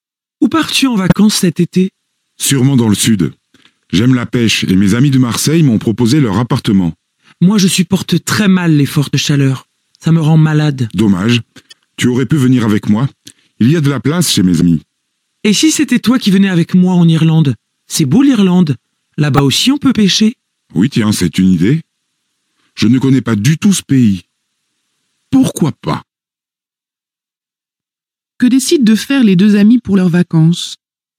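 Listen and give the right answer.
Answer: Partir ensemble en Irlande (et y pêcher)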